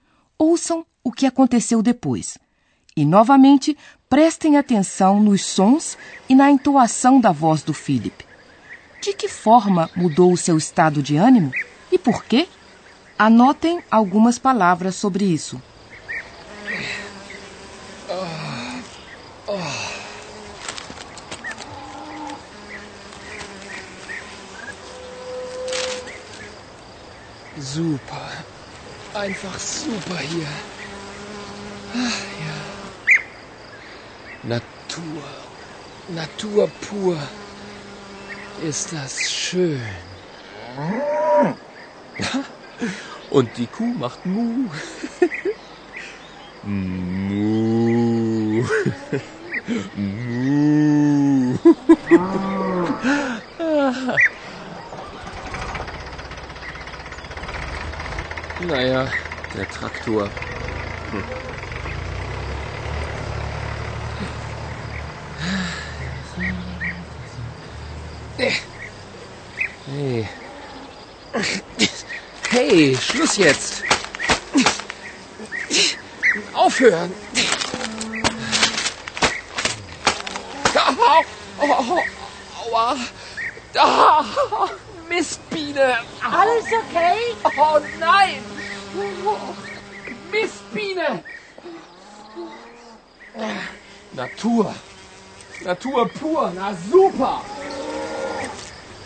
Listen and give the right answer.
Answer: O humor de Philip mudou de repente quando ele foi picado por uma abelha.